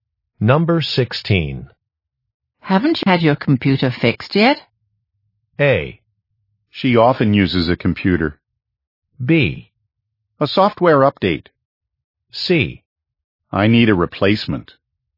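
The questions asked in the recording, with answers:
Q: Haven't you had your computer fixed yet?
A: C: I need a replacement.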